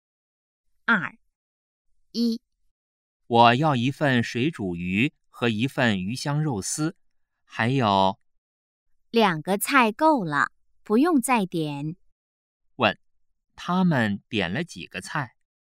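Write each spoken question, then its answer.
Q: 问,他们点了几个菜?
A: 两个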